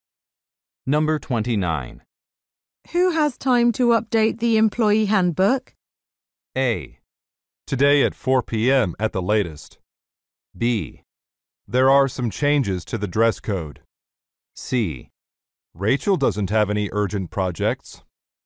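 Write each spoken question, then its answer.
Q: Who has time to update the employee handbook?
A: C: Rachel doesn't have any urgent projects.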